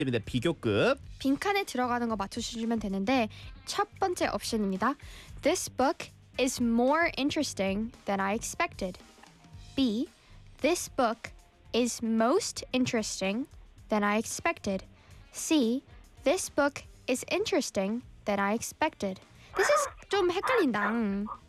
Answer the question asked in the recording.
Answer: 맞습니다. 네. A, more interesting.